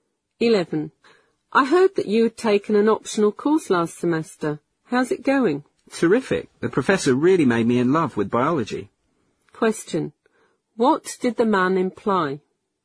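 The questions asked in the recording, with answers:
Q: What did the man imply?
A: He really enjoys the course (biology)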